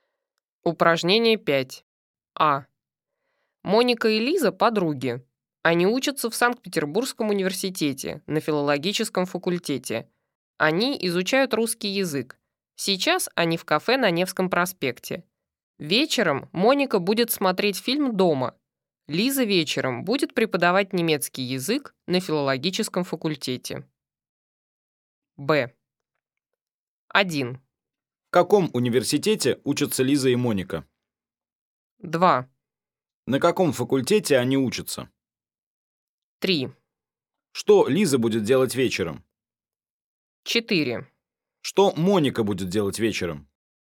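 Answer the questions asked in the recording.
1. В Санкт-Петербургском университете
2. На филологическом факультете
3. Преподавать немецкий язык на филологическом факультете
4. Смотреть фильм дома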